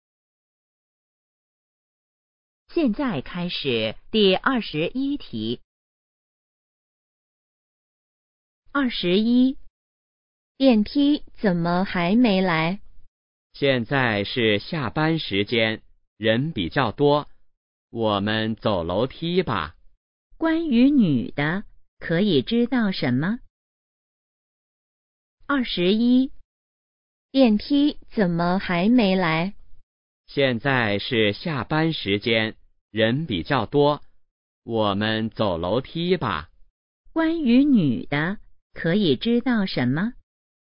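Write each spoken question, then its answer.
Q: 关于女的,可以知道什么?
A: 她想走楼梯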